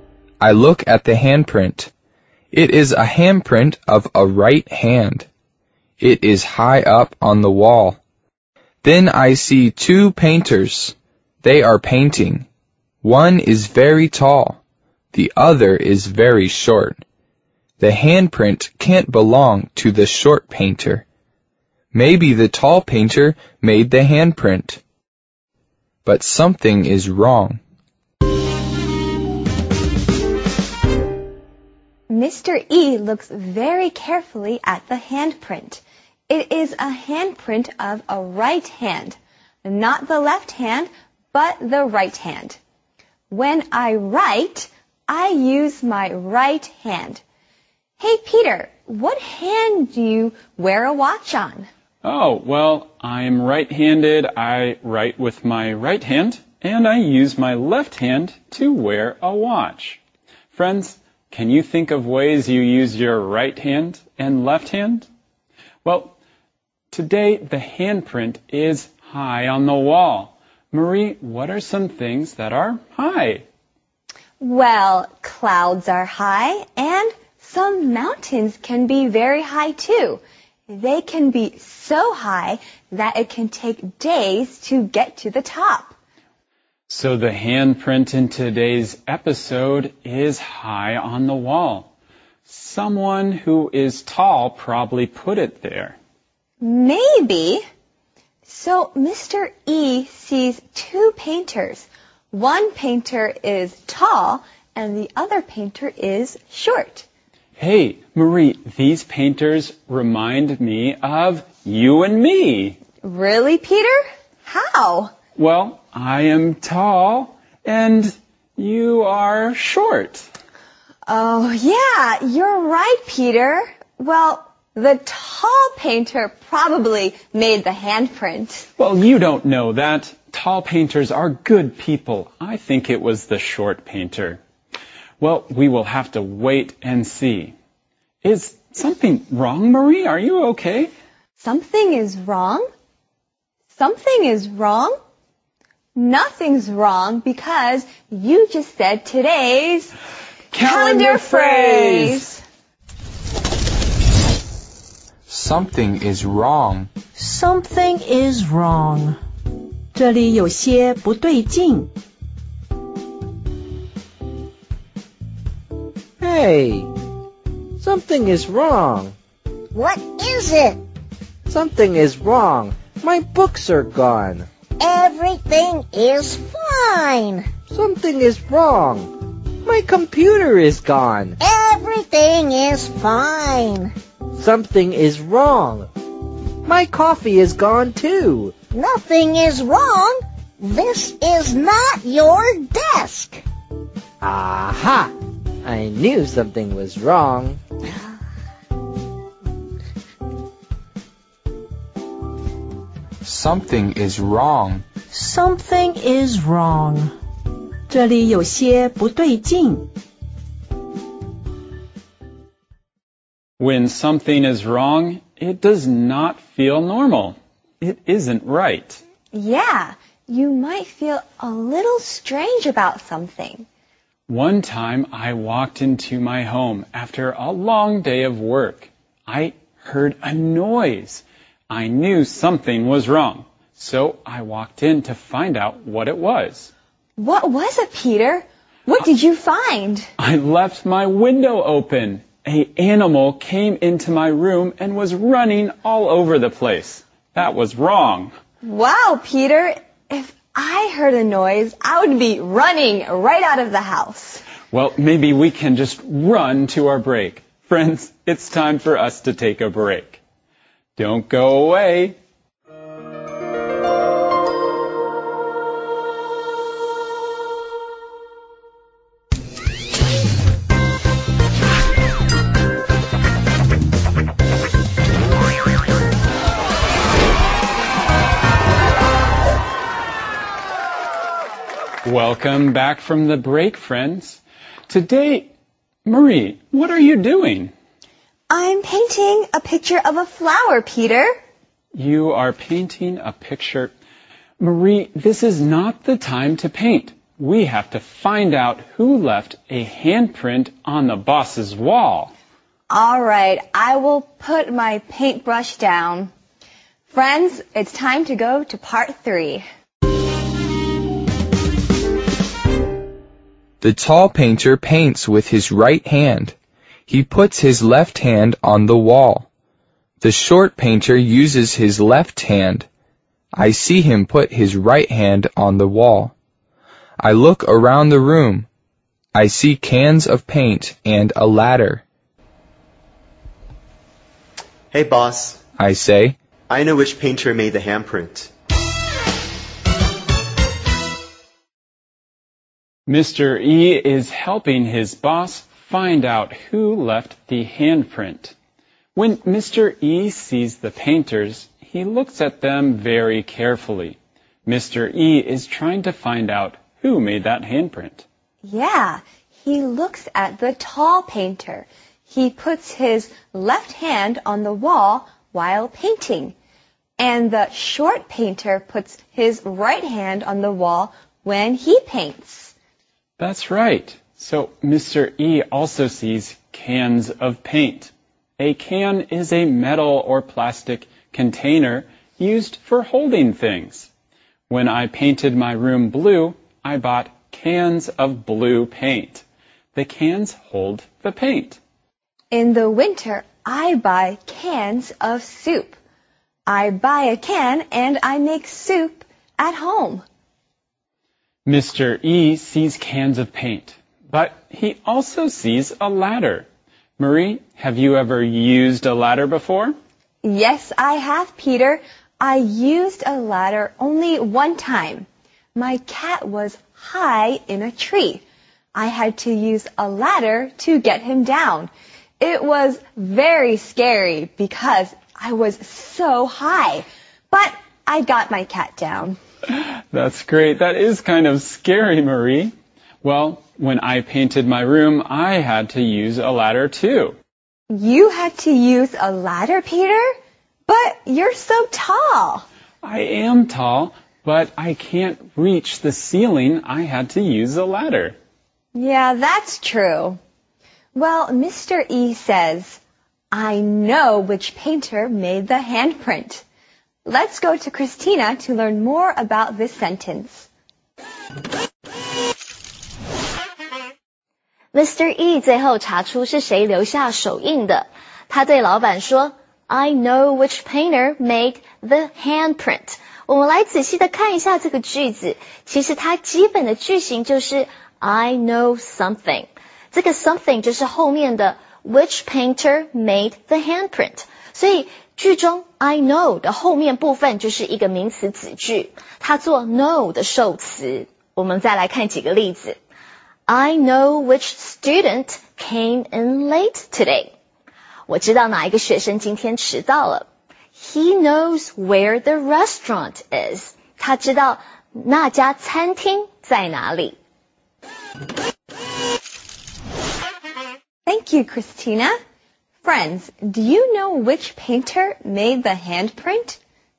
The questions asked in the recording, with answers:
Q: Friends, do you know which painter made the handprint?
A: The short painter made the handprint.